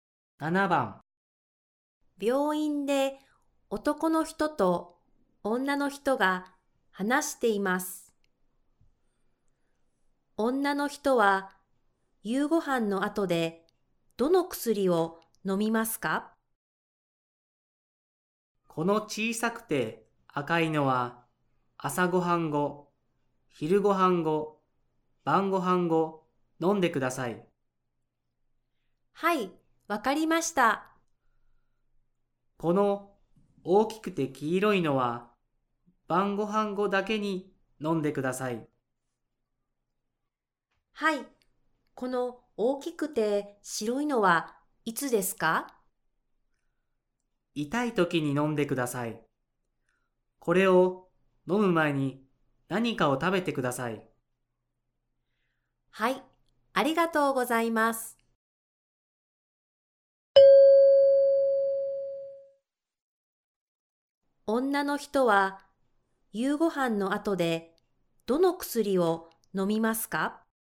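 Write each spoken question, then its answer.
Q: 女の人は夕ご飯の後でどの薬を飲みますか?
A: 小さくて赤い薬と大きくて黄色い薬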